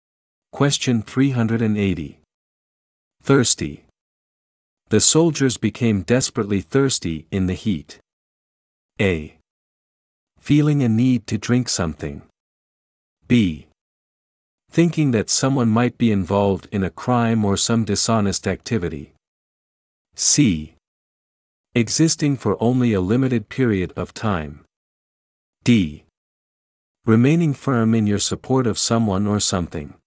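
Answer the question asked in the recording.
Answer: A: Feeling a need to drink something.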